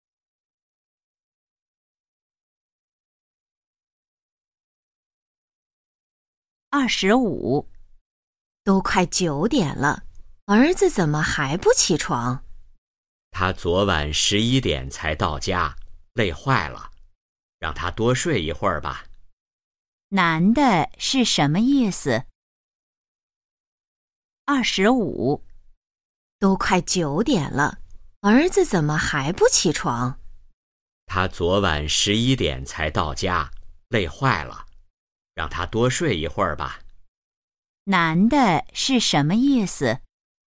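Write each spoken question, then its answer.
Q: 男的是什么意思?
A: 让儿子多睡一会儿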